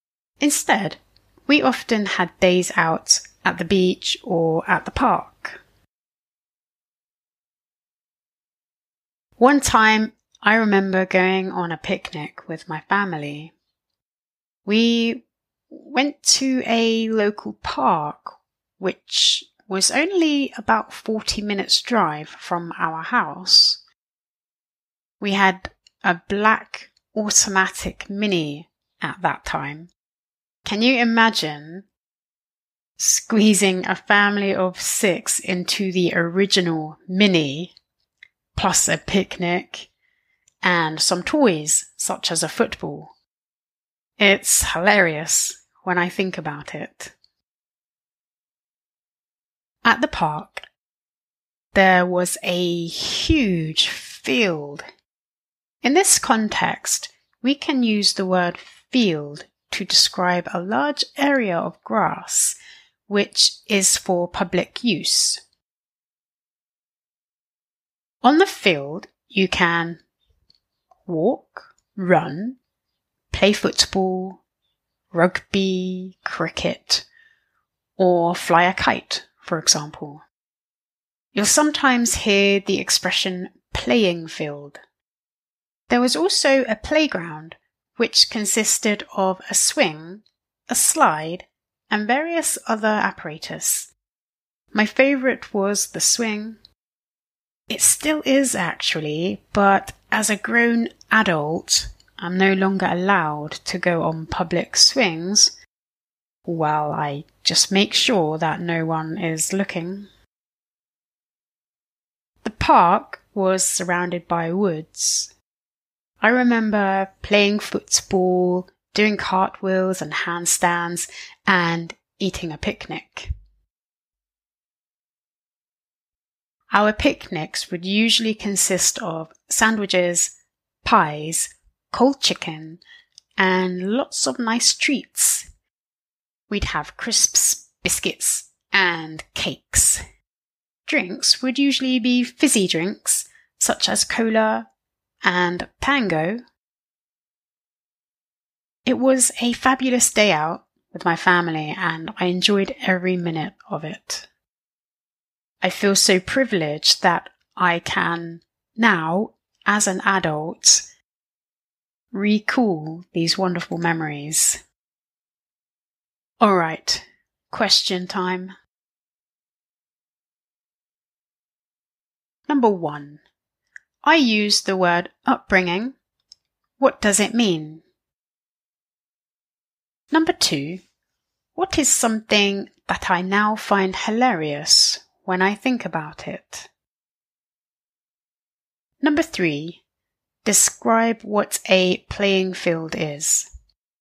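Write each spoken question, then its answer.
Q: what is something that I now find hilarious when I think about it?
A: Squeezing a family of six into the original Mini with a picnic and toys

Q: describe what a playing field is.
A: A large area of grass for public use, where you can walk, run, play sports or fly a kite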